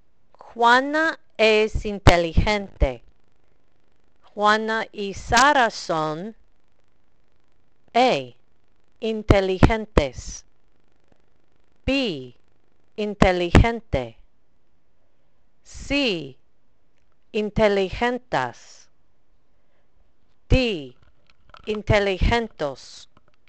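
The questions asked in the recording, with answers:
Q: Juana es inteligente. Juana y Sara son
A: A: inteligentes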